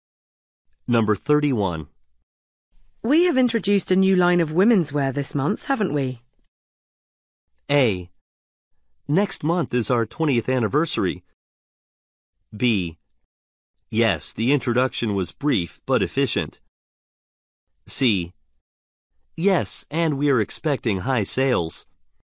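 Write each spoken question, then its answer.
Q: We have introduced a new line of women's wear this month, haven't we?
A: C: Yes, and we are expecting high sales.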